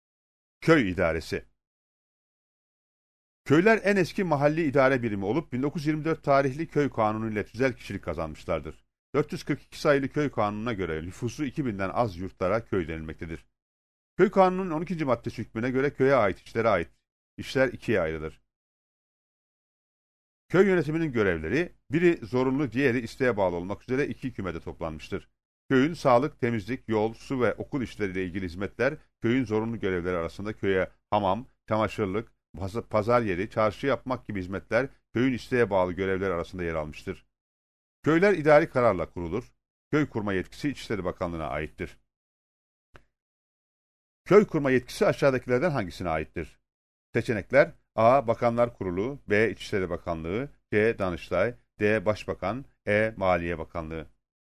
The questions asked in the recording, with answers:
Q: Köy kurma yetkisi aşağıdakilerden hangisine aittir?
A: Doğru cevap B seçeneğidir.